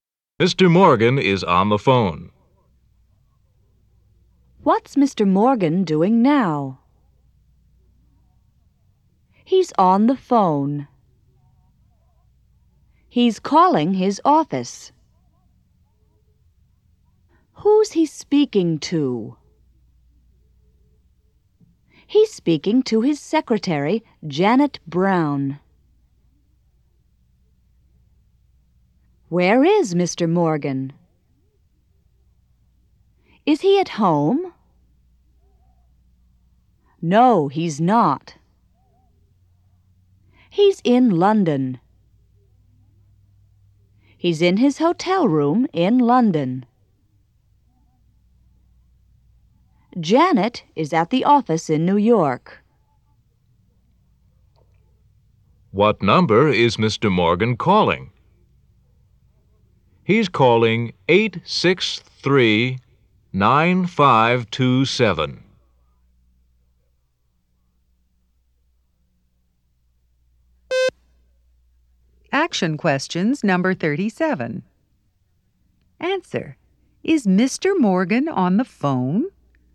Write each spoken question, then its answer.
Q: Is Mr. Morgan on the phone?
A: Yes, he is.